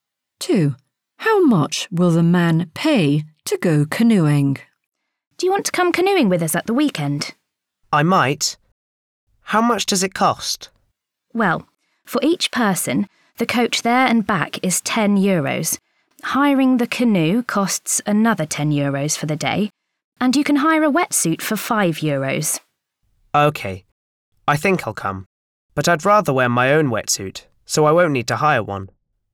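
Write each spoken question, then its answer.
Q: How much will the man pay to go canoeing?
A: 20 euros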